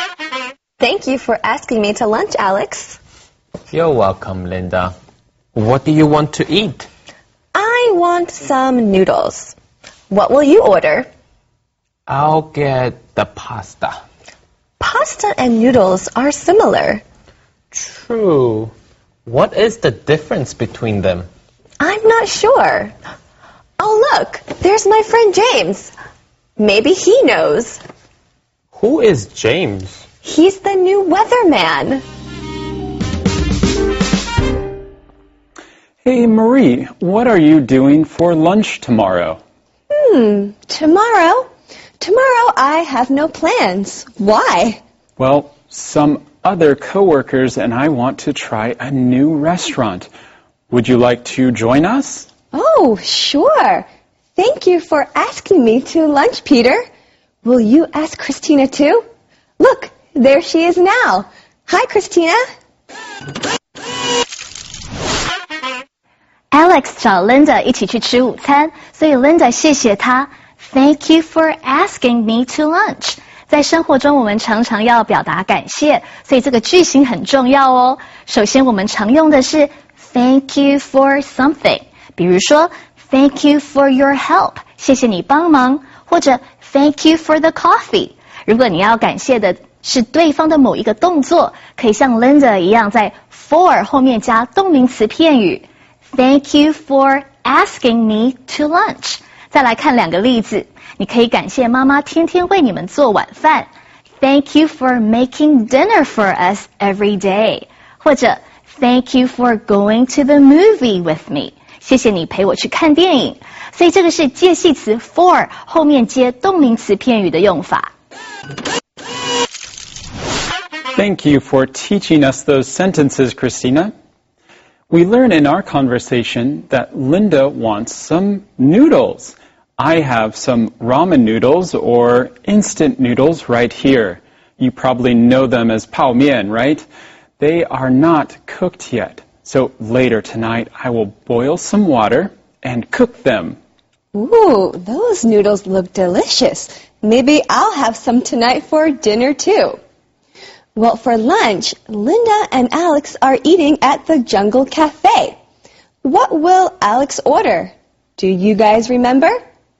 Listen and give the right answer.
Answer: Very good. He will order pasta.